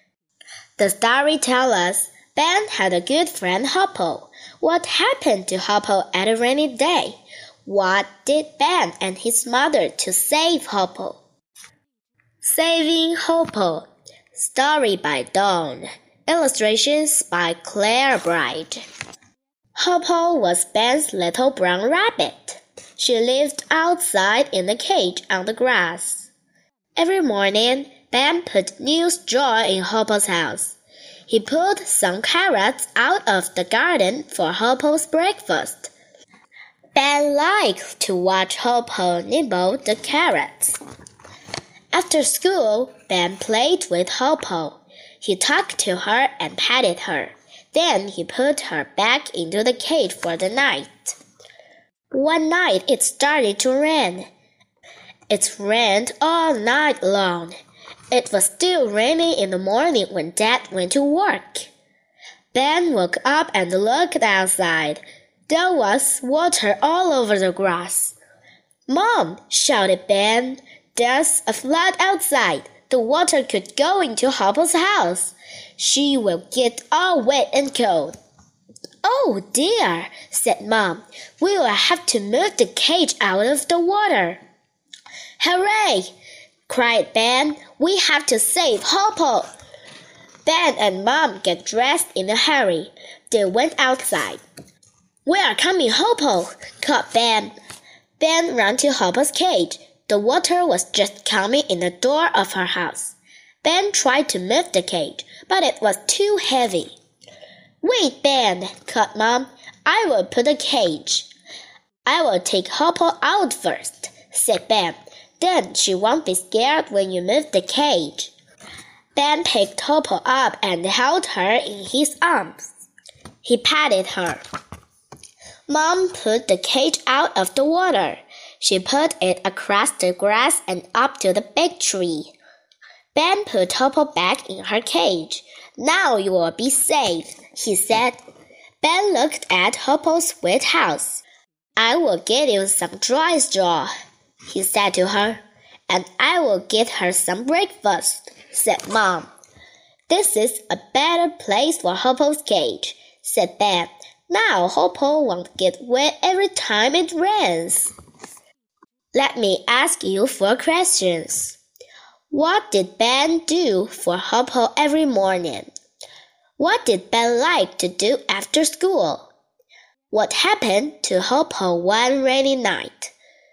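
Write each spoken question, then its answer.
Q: What did Ben do for Hoppo every morning?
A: Put new straw in Hoppo's house and pulled carrots from the garden for her breakfast

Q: What did Ben like to do after school?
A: Play with Hoppo, talk to her and pat her

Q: What happened to Hoppo one rainy night?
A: Her house flooded with water, so Ben and Mom moved her cage out of the water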